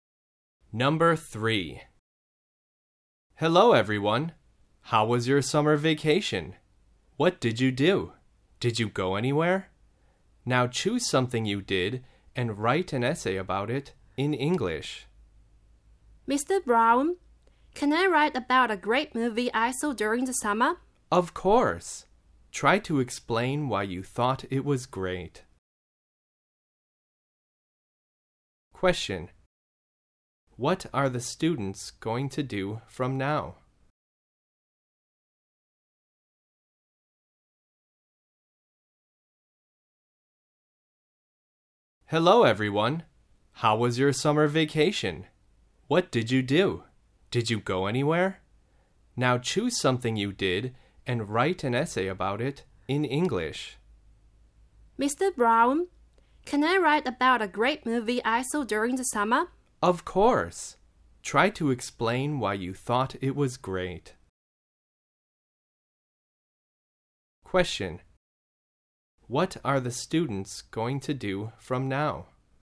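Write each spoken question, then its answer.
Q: What are the students going to do from now?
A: Write an essay in English about something they did during summer vacation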